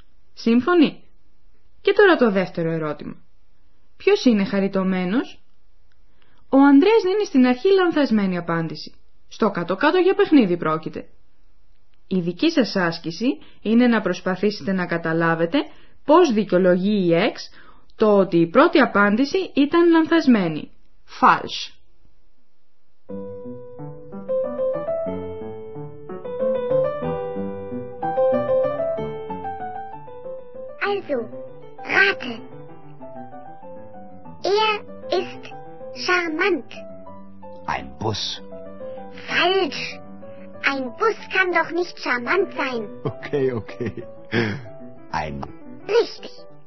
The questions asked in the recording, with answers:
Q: Η δική σας άσκηση είναι να προσπαθήσετε να καταλάβετε πώς δικαιολογεί η Εξ το ότι η πρώτη απάντηση ήταν λανθασμένη.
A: Ένα λεωφορείο δεν μπορεί να είναι χαριτωμένο.